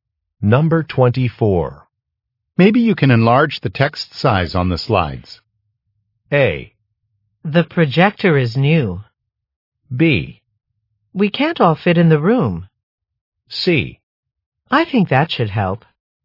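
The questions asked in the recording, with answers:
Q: Maybe you can enlarge the text size on the slides.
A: C: I think that should help.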